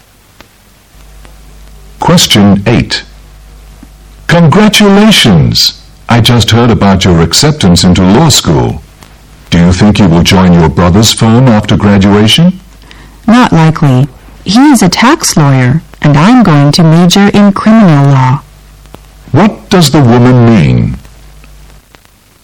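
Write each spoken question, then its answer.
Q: What does the woman mean?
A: She probably won't join her brother's firm because she'll study criminal law, not tax law.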